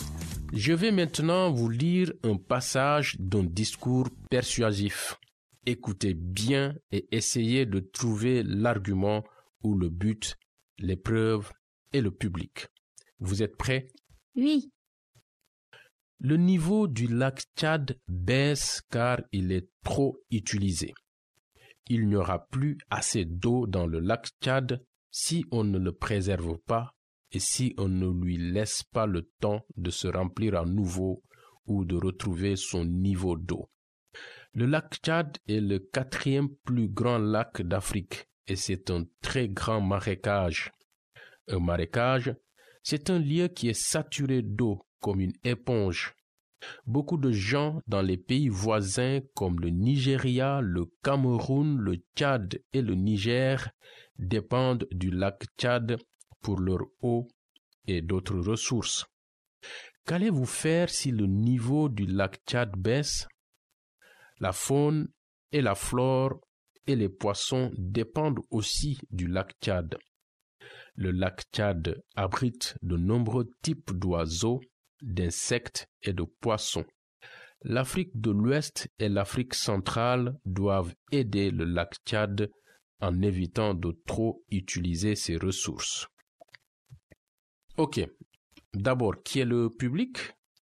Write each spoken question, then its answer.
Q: Ok, d'abord, qui est le public?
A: Les habitants d'Afrique de l'Ouest et d'Afrique centrale?